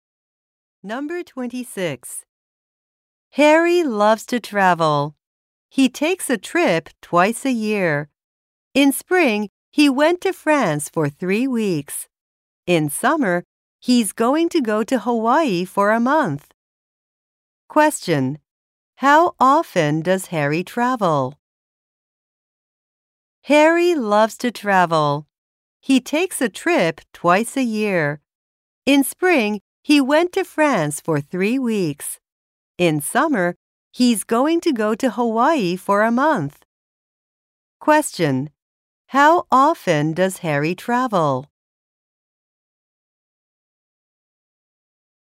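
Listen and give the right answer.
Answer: Twice a year.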